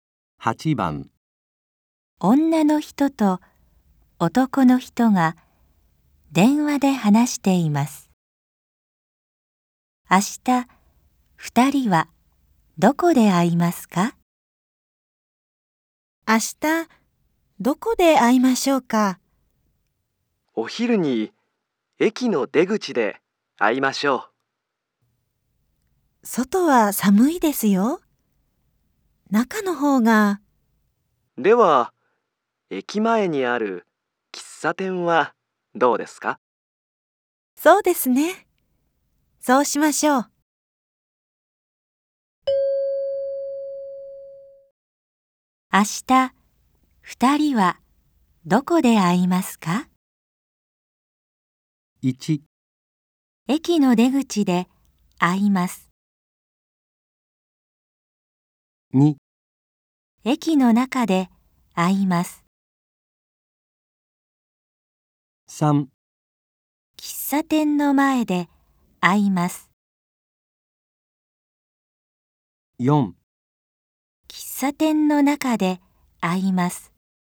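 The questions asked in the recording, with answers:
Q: 明日、二人はどこで会いますか?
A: 4: 喫茶店の中で会います。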